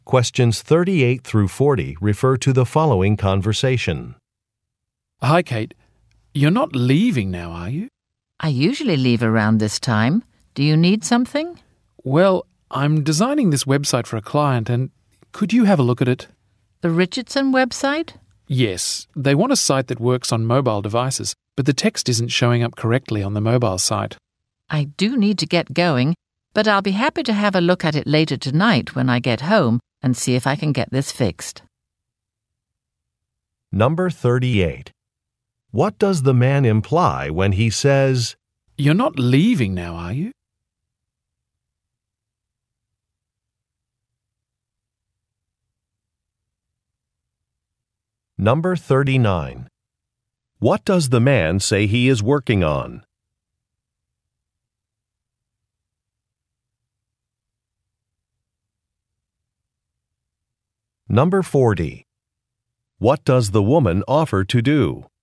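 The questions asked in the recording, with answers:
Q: What does the man say he is working on?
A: A website for a client (the Richardson website)

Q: What does the woman offer to do?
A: Look at the website later tonight from home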